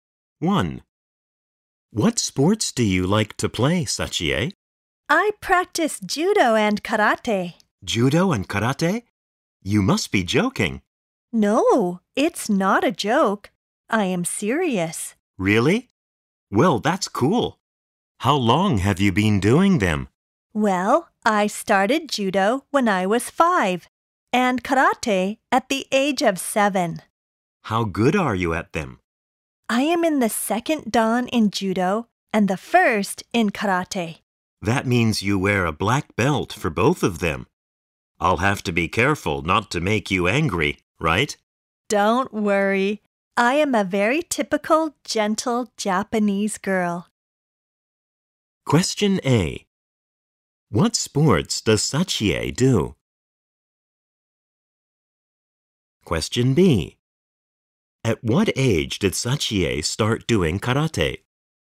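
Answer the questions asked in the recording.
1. Judo and karate
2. At the age of 7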